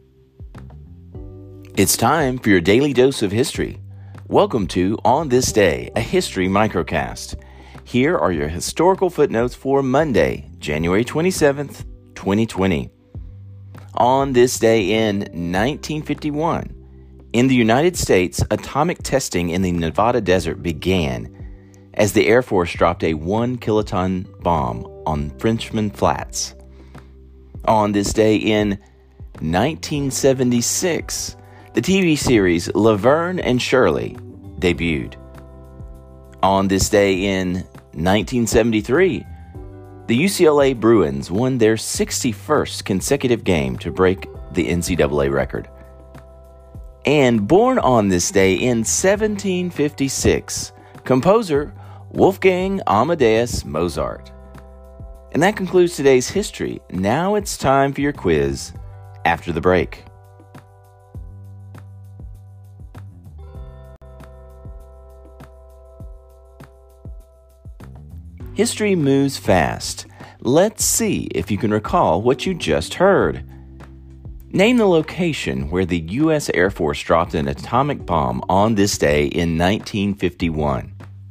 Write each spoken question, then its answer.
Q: Name the location where the U.S. Air Force dropped an atomic bomb on this day in 1951.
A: Answer Frenchman Flats in the Nevada desert.